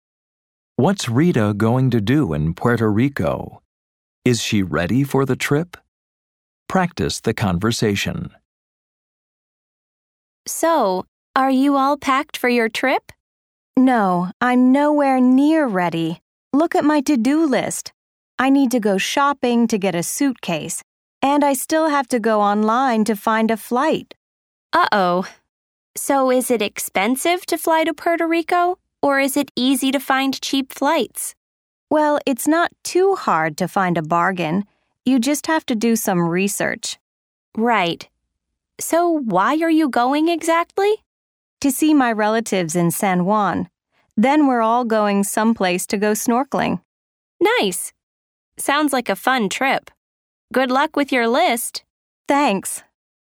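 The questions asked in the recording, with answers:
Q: What's Rita going to do in Puerto Rico?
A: See her relatives in San Juan and go snorkeling

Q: Is she ready for the trip?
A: No, she's nowhere near ready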